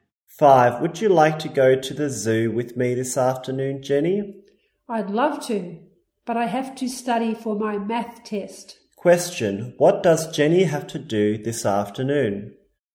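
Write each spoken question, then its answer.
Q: Question, what does Jenny have to do this afternoon?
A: Study for her math test.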